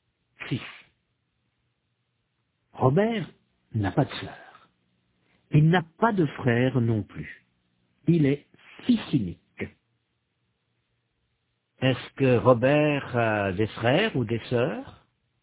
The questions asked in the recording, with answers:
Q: Est-ce que Robert a des frères ou des sœurs?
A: Non, il est fils unique.